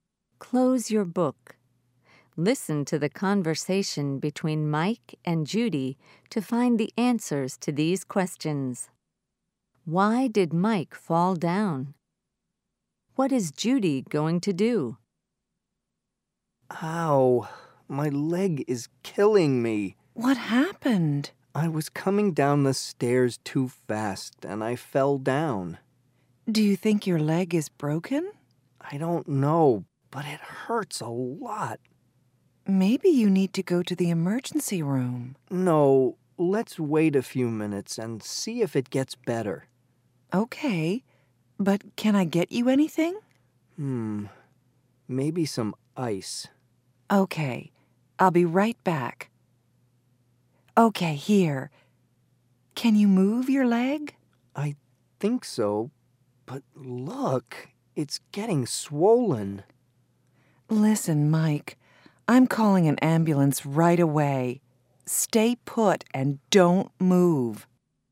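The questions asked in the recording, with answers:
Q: Why did Mike fall down?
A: He was coming down the stairs too fast.

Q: What is Judy going to do?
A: Call an ambulance.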